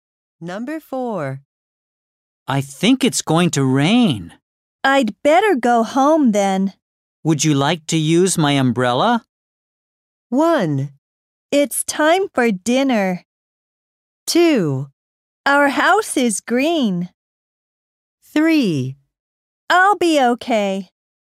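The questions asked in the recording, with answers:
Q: Would you like to use my umbrella?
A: 3: I'll be okay.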